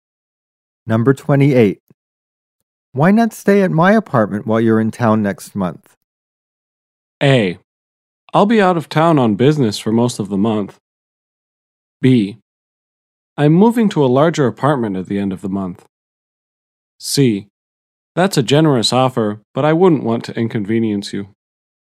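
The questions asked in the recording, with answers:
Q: Why not stay at my apartment while you're in town next month?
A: C: That's a generous offer, but I wouldn't want to inconvenience you.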